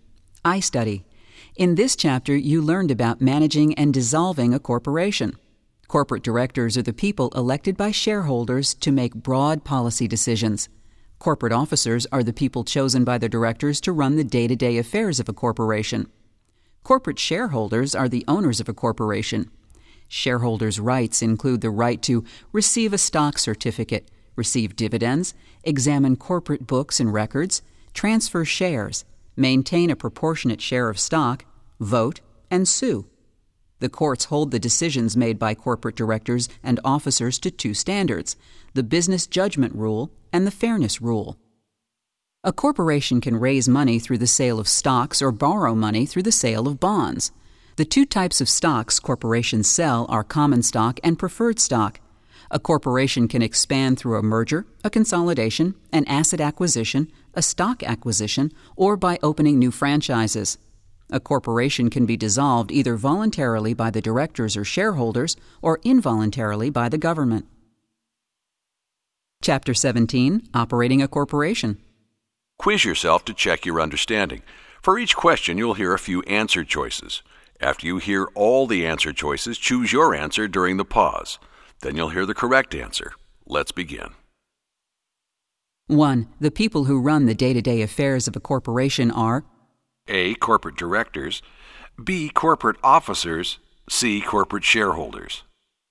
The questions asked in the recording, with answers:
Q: The people who run the day-to-day affairs of a corporation are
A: The correct answer is B. Corporate officers.